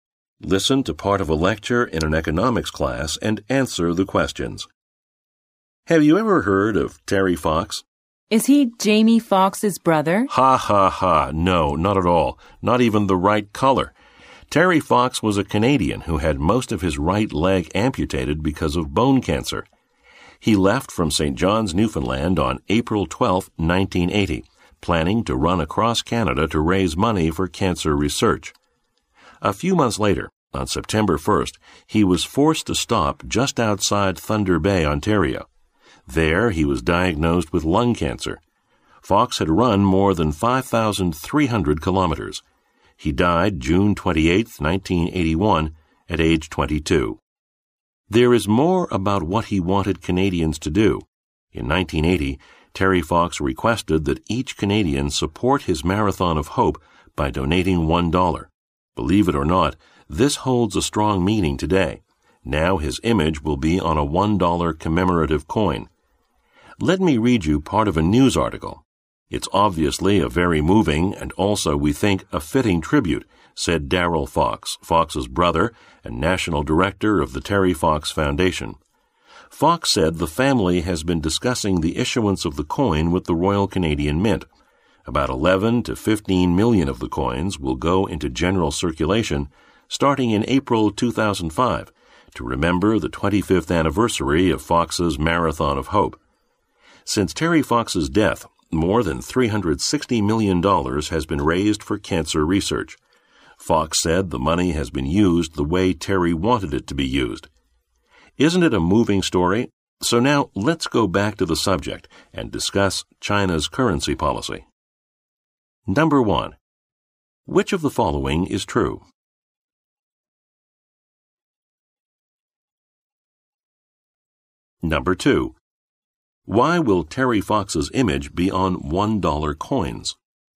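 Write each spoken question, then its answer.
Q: Why will Terry Fox's image be on $1 coins?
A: To honor him, because he had asked every Canadian to give $1 to his Marathon of Hope. The coin also marks the Marathon's 25th anniversary.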